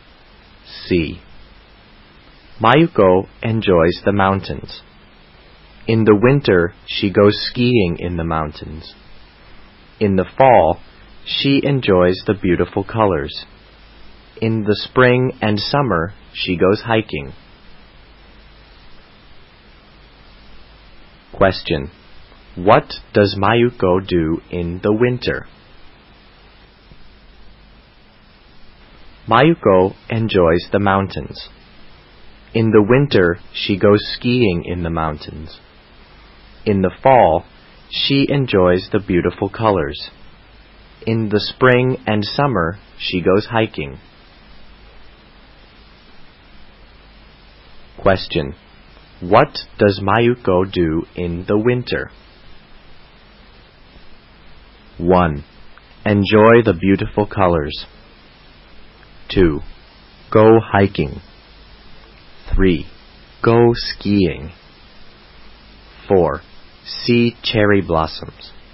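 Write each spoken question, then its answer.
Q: What does Mayuko do in the winter?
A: 3: Go skiing.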